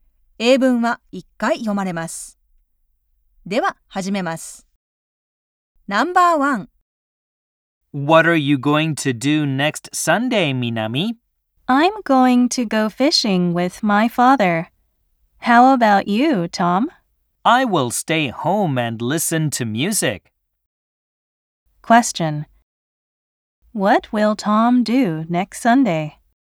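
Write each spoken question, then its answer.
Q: What will Tom do next Sunday?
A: He will stay home and listen to music.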